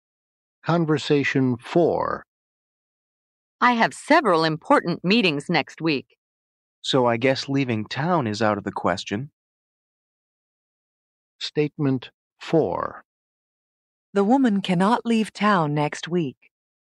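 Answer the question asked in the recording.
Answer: True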